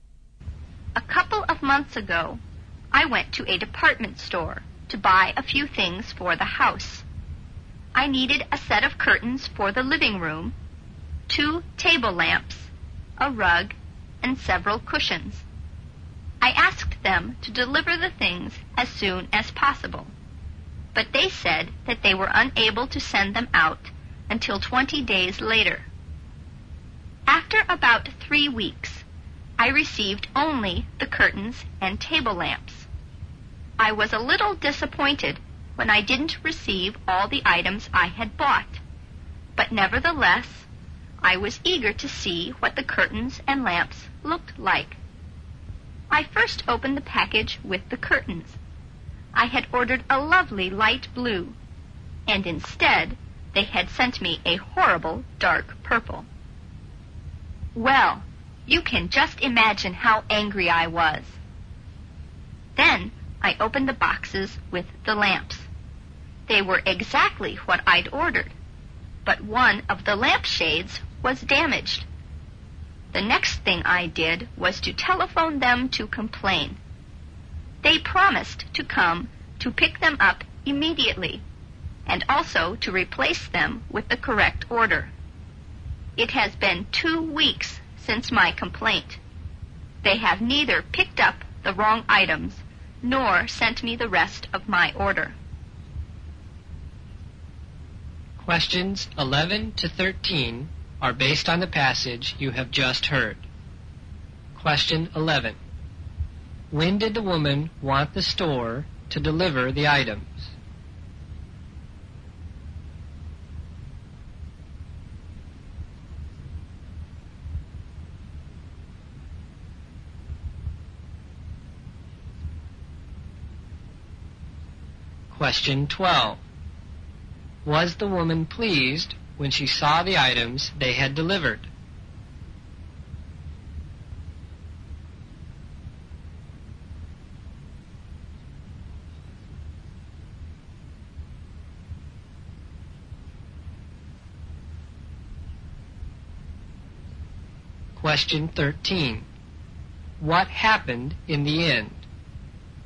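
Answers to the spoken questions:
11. As soon as possible
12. No
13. The store neither picked up the wrong items nor sent the rest of the order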